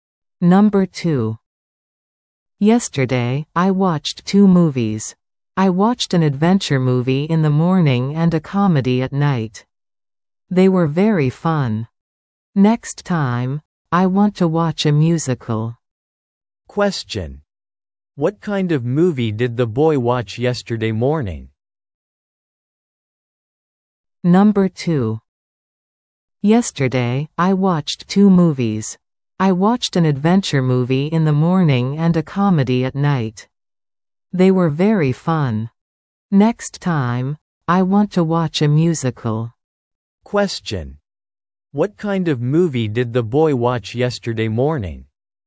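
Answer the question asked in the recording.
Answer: An adventure movie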